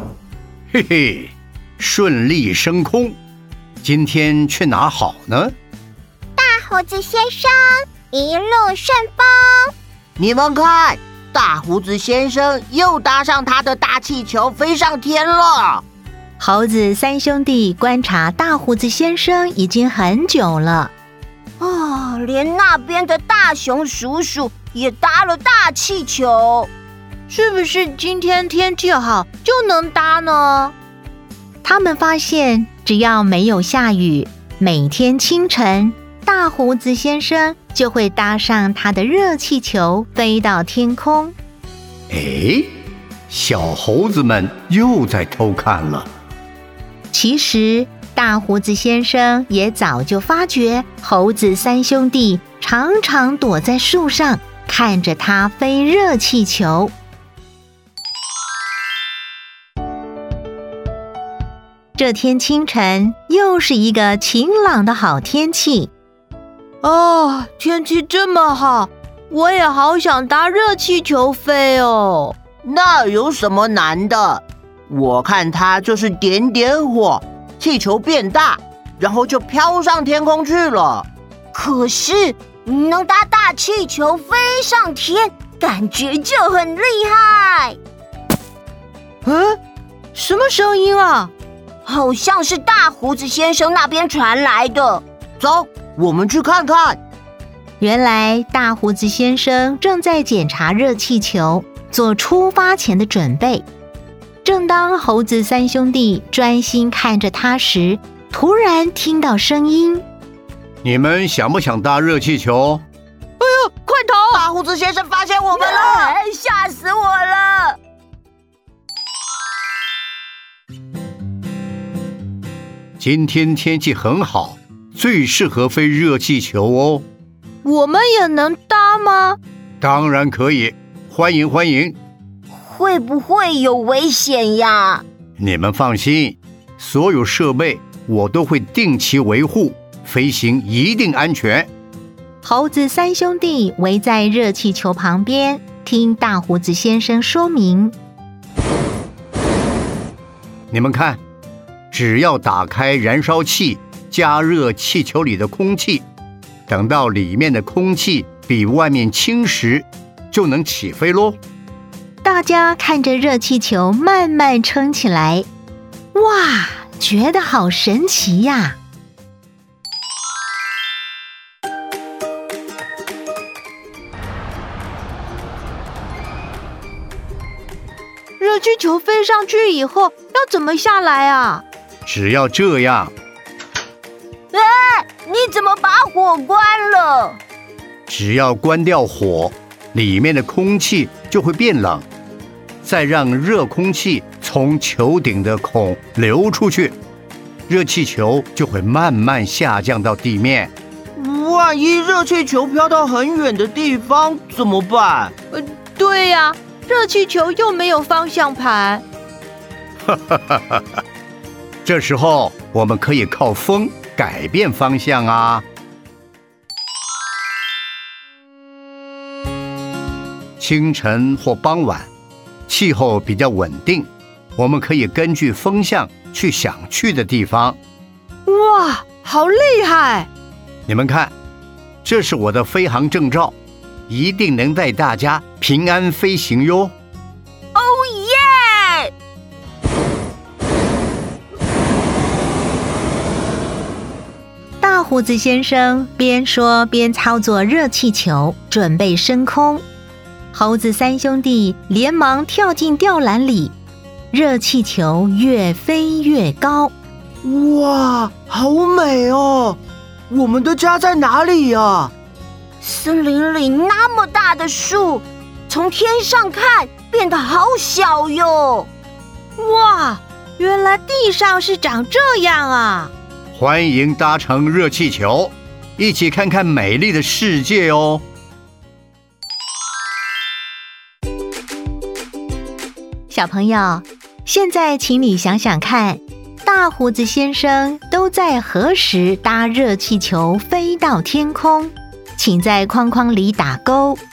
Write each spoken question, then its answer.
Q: 大胡子先生都在何时搭热气球飞到天空?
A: 清晨。